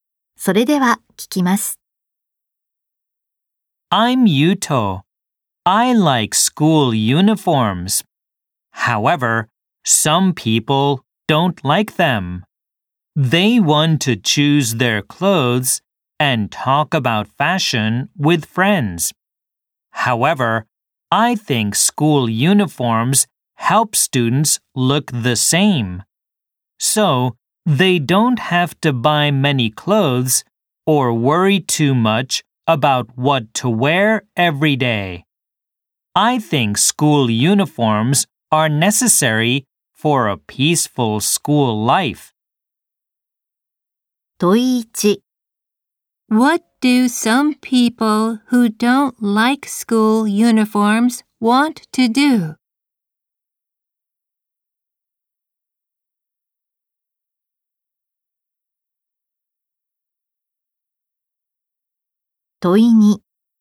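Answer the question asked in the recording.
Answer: Choose their clothes and talk about fashion with friends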